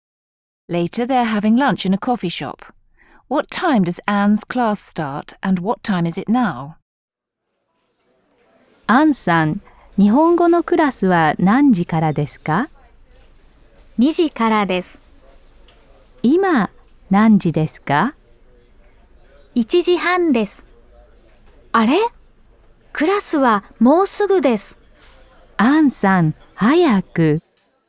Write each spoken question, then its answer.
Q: What time does Anne's class start and what time is it now?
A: Anne's class starts at 2 o'clock. It's now 1:30.